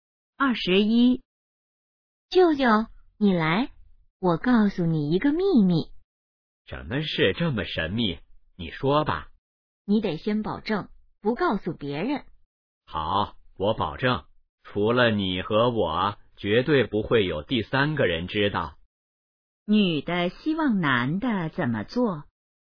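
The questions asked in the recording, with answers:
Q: 女的希望男的怎么做?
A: 保守秘密,不告诉别人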